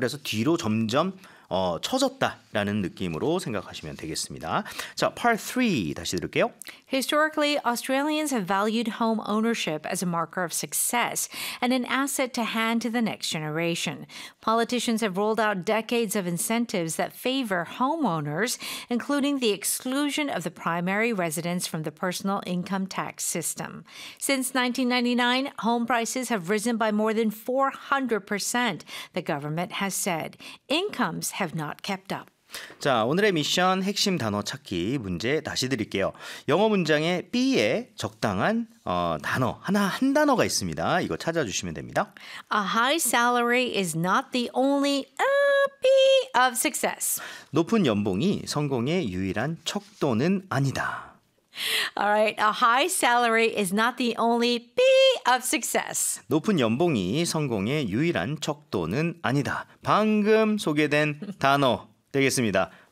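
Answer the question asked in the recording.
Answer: marker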